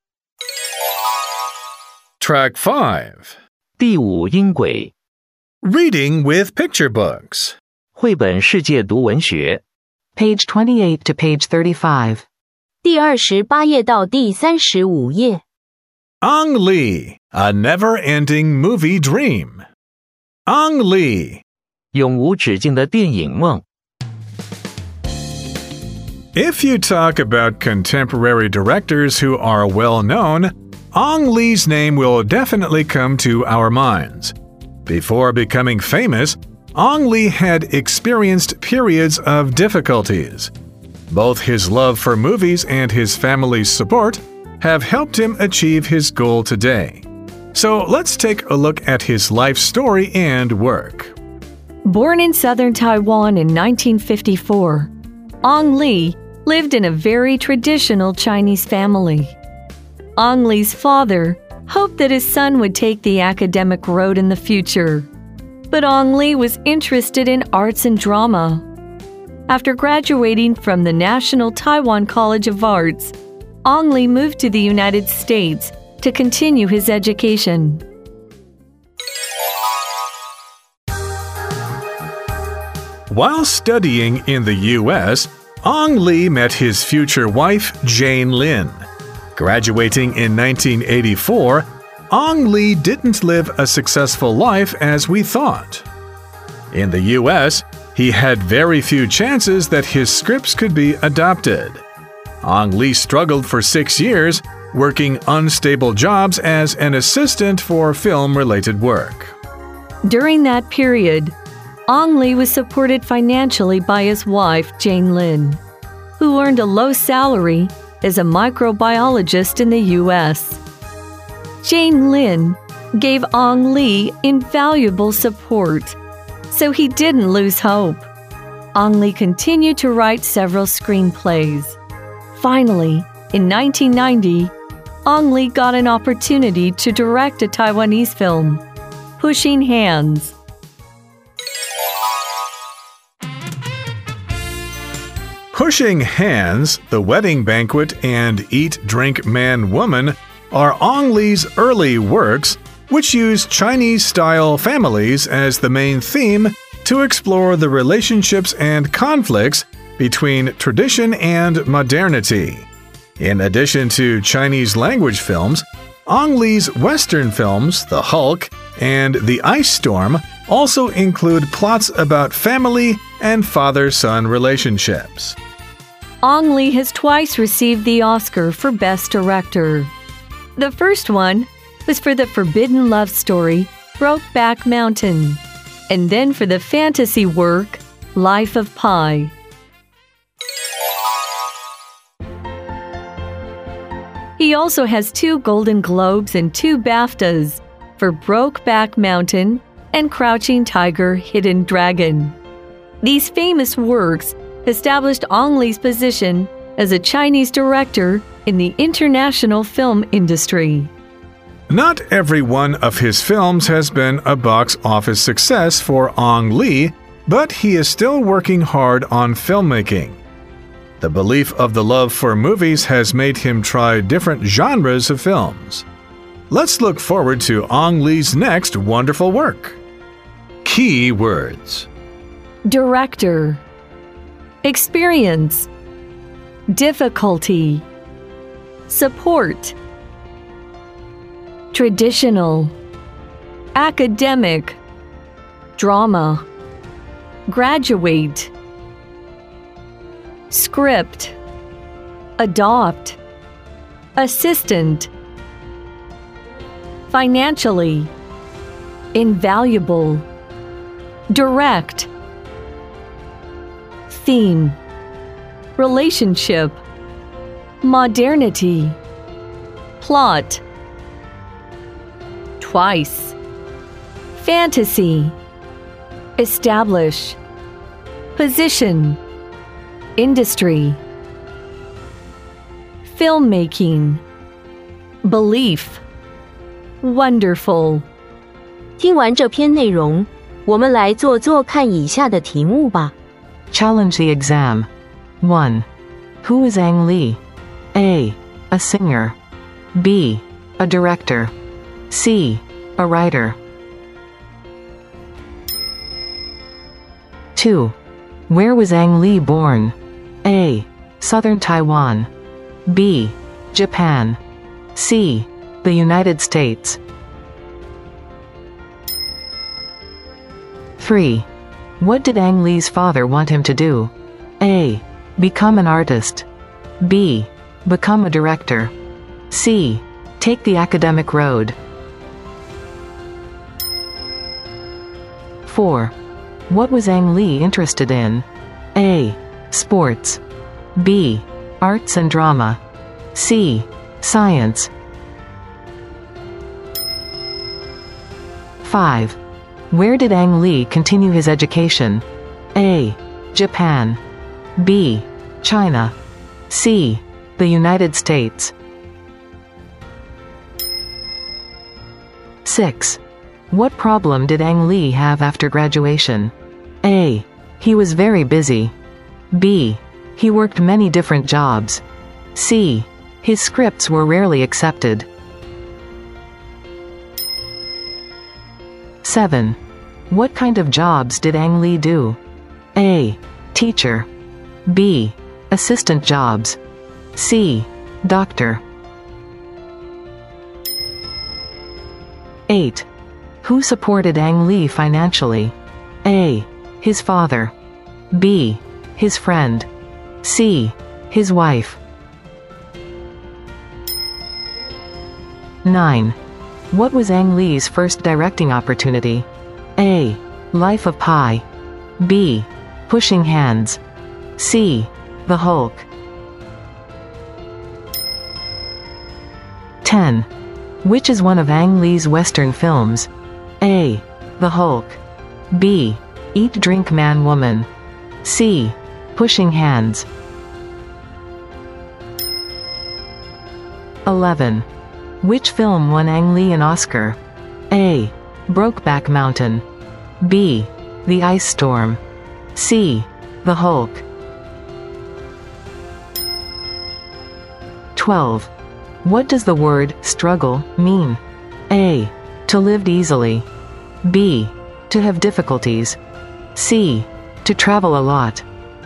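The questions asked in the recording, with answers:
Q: Who is Ang Lee?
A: B: A director.

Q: Where was Ang Lee born?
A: A: Southern Taiwan.

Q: What did Ang Lee's father want him to do?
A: C: Take the academic road.

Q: What was Ang Lee interested in?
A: B: Arts and drama.

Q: Where did Ang Lee continue his education?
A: C: The United States.

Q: What problem did Ang Lee have after graduation?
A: C: His scripts were rarely accepted.

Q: What kind of jobs did Ang Lee do?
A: B: Assistant jobs.

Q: Who supported Ang Lee financially?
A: C: His wife.

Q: What was Ang Lee's first directing opportunity?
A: B: Pushing Hands.

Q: Which is one of Ang Lee's Western films?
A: A: The Hulk.

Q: Which film won Ang Lee an Oscar?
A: A: Brokeback Mountain.

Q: What does the word struggle mean?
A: B: To have difficulties.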